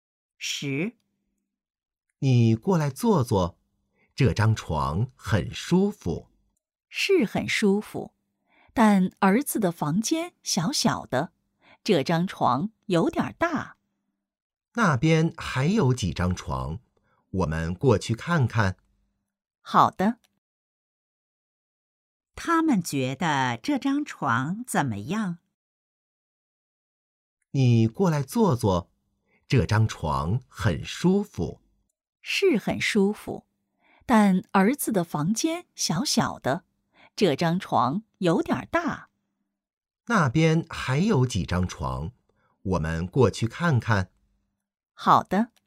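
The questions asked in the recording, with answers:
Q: 他们觉得这张床怎么样?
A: 很舒服,但有点大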